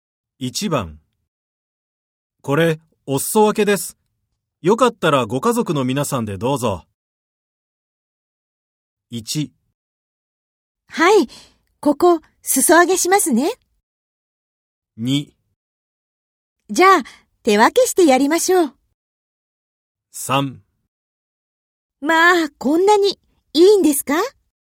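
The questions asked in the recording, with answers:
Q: これ、お裾分けです。よかったらご家族の皆さんでどうぞ。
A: 3: まあ、こんなにいいんですか?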